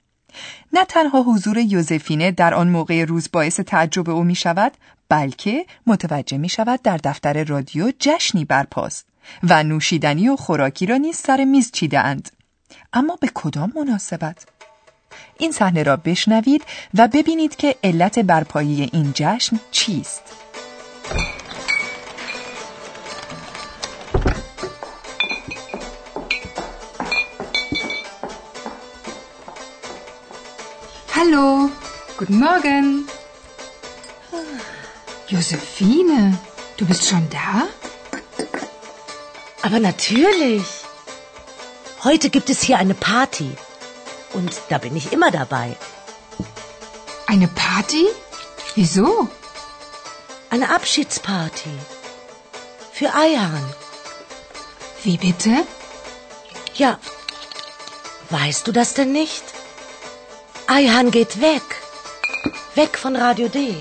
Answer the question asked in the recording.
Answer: این یک جشن خداحافظی برای آیهان است، چون که او رادیو دی را ترک می کند.